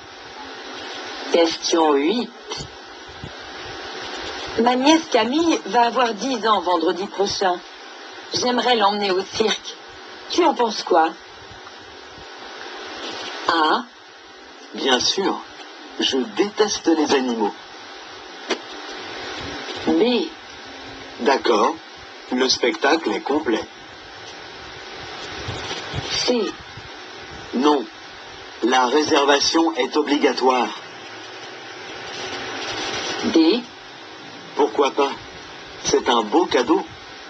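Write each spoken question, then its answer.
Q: Tu en penses quoi?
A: D: Pourquoi pas? C'est un beau cadeau.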